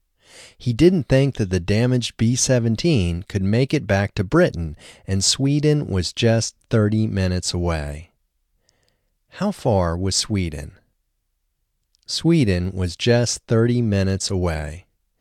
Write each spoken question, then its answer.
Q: How far was Sweden?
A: Sweden was just 30 minutes away.